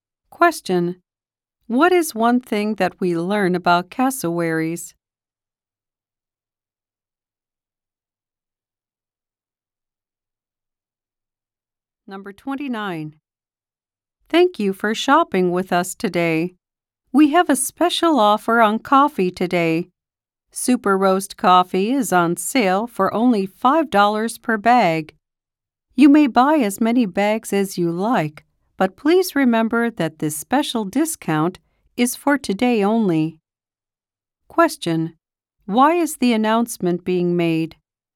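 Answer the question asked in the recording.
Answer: To tell shoppers about a one-day coffee sale.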